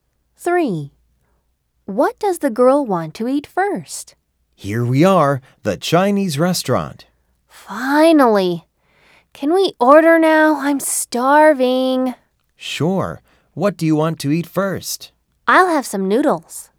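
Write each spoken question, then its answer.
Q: What does the girl want to eat first?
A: noodles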